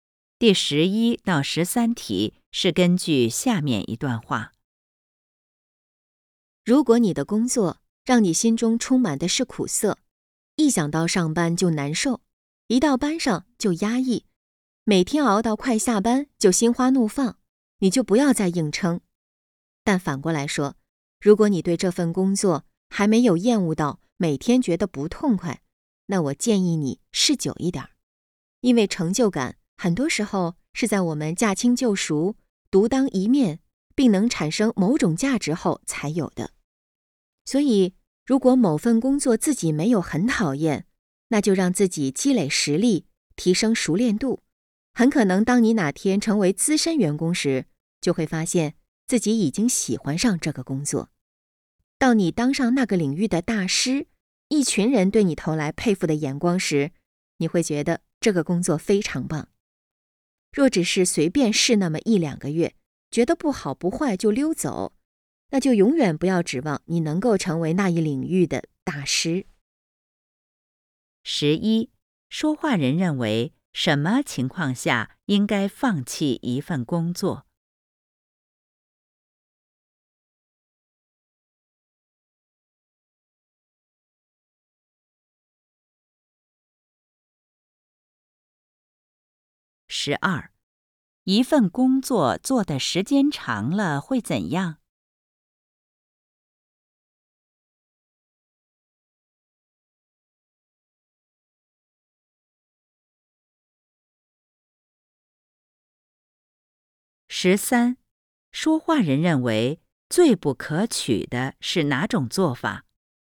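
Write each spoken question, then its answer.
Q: 说话人认为什么情况下应该放弃一份工作?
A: 工作让人心中充满苦涩、一想到上班就难受的时候

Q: 一份工作做的时间长了会怎样?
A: 可能会喜欢上这个工作

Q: 说话人认为最不可取的是哪种做法?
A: 随便试一两个月,觉得不好不坏就离开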